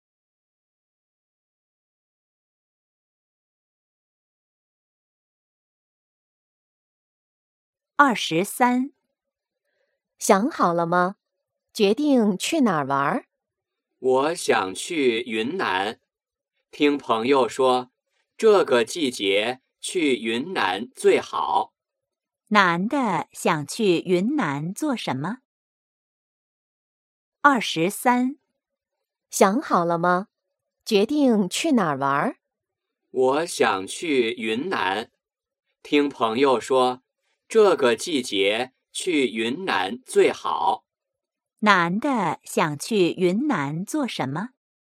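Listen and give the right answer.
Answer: 去玩(旅游)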